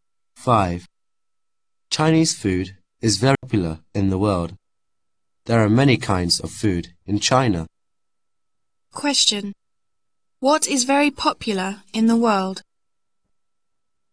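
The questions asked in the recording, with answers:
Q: What is very popular in the world?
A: Chinese food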